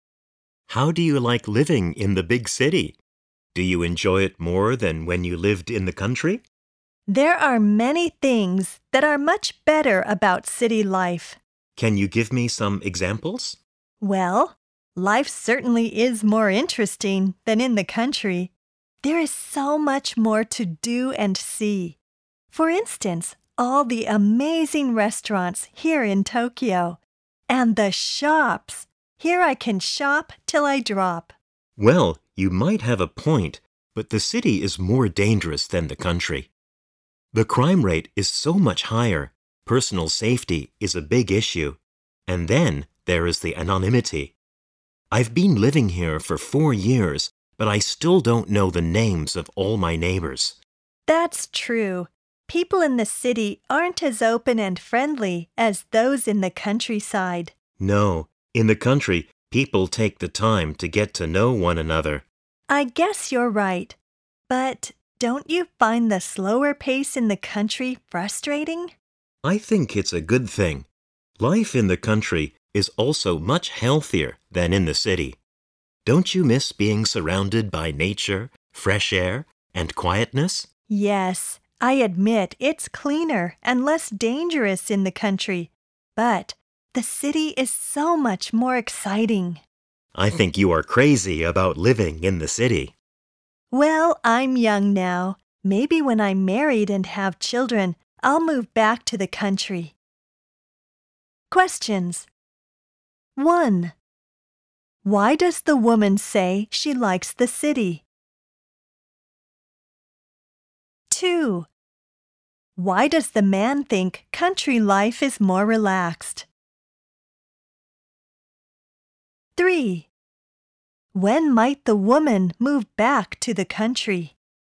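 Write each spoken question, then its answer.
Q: Why does the woman say she likes the city?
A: Life is more interesting, with much more to do and see, like restaurants and shops.

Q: When might the woman move back to the country?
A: When she is married and has children.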